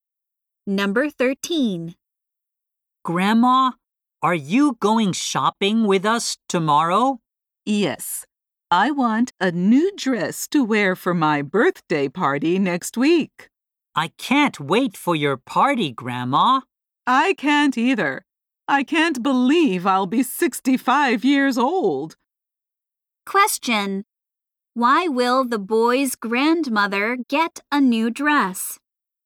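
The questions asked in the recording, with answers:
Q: Why will the boy's grandmother get a new dress?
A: To wear at her birthday party next week.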